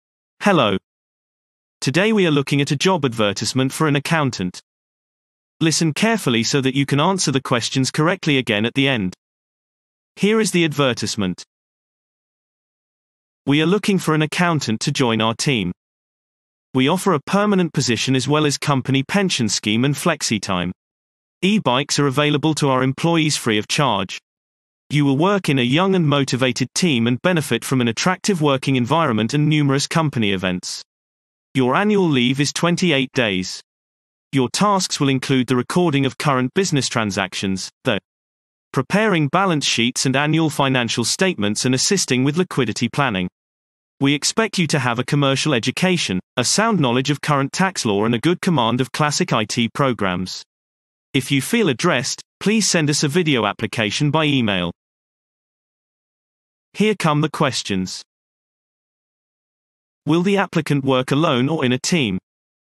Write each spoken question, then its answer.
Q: Will the applicant work alone or in a team?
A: Response. The applicant will work in a team.